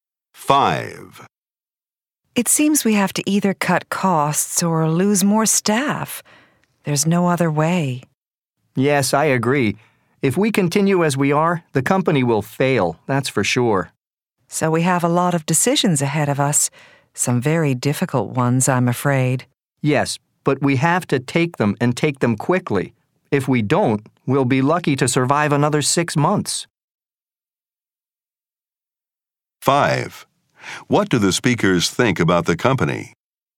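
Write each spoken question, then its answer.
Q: What do the speakers think about the company?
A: It is in serious trouble and will fail unless they act quickly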